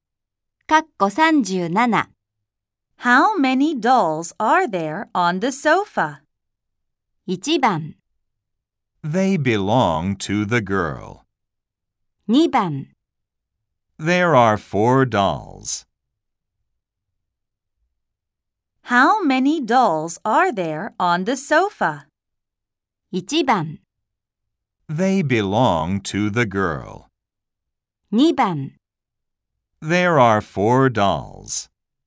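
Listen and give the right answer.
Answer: 2: There are 4 dolls.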